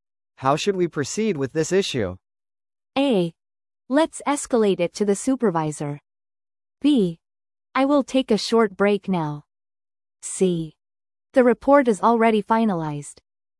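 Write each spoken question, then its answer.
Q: How should we proceed with this issue?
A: A: Let's escalate it to the supervisor.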